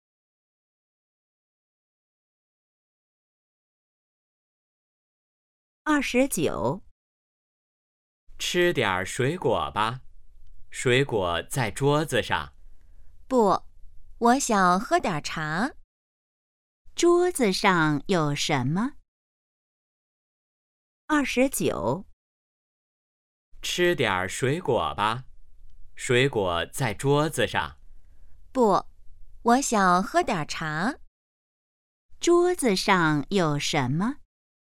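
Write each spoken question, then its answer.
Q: 桌子上有什么?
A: 水果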